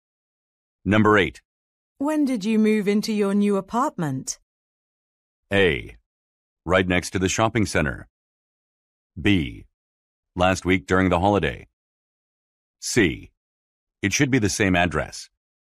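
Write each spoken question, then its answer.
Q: When did you move into your new apartment?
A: B: Last week during the holiday.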